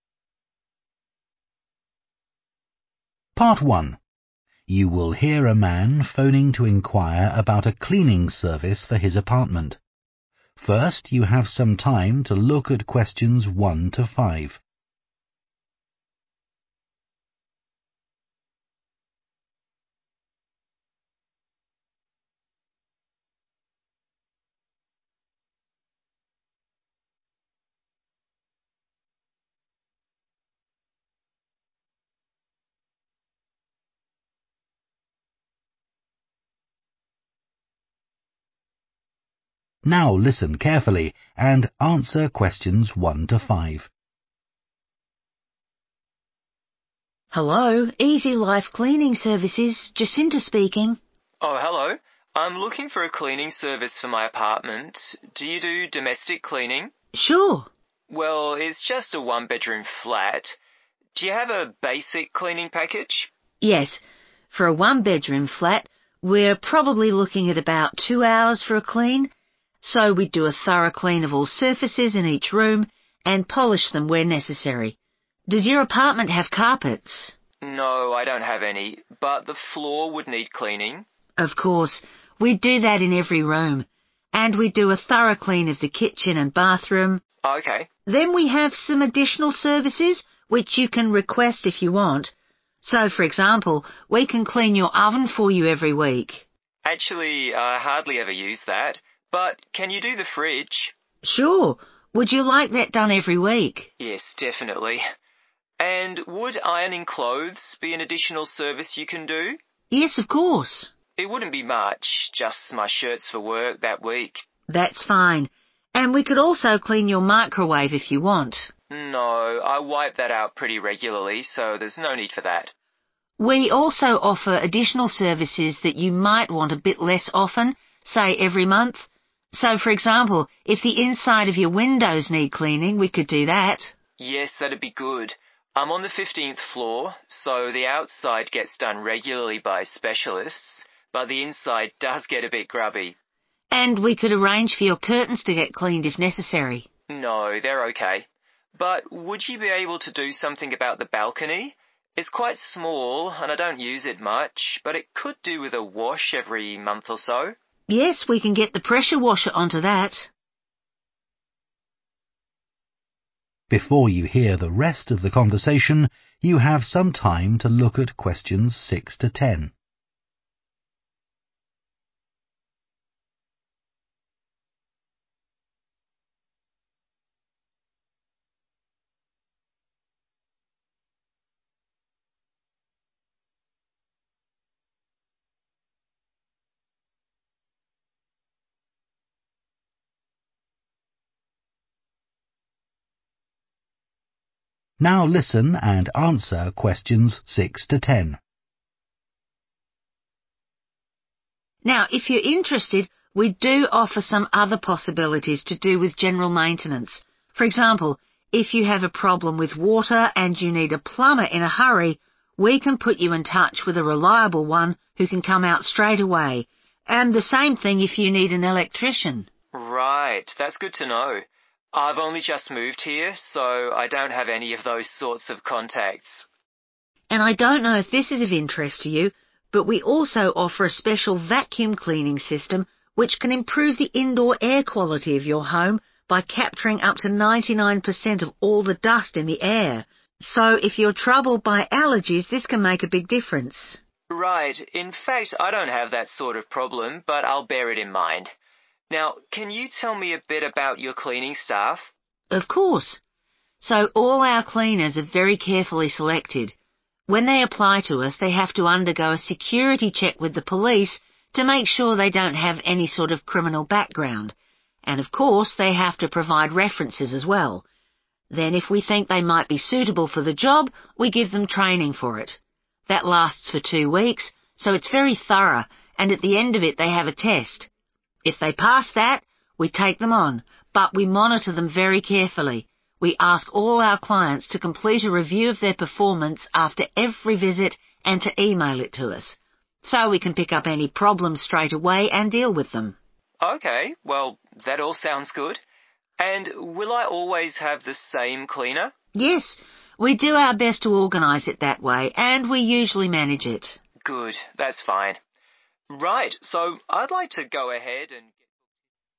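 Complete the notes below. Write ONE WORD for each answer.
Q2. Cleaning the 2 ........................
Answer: fridge

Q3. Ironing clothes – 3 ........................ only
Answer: shirts

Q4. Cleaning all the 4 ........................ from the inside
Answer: windows

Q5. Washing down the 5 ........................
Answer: balcony

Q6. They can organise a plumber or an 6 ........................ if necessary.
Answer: electrician

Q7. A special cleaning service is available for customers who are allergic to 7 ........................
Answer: dust

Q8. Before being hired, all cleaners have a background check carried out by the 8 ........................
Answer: police

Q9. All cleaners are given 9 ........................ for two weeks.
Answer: training

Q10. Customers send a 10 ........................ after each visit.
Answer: review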